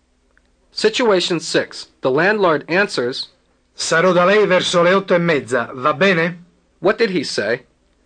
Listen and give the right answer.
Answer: He said, I'll be at your house around 8:30, okay?